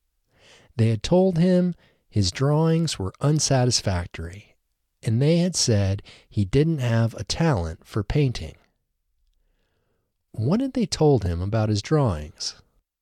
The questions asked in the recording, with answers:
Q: What had they told him about his drawings?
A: They had told him his drawings were unsatisfactory.